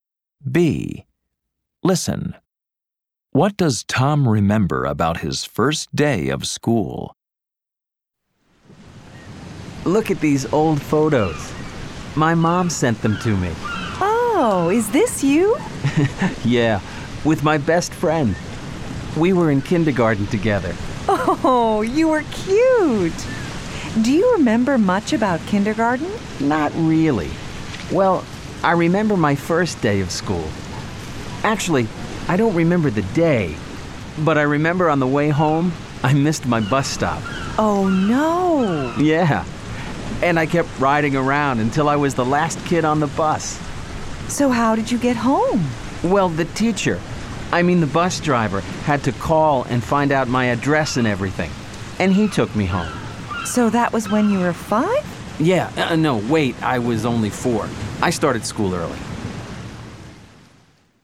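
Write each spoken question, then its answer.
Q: What does Tom remember about his first day of school?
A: He missed his bus stop on the way home and the bus driver took him home.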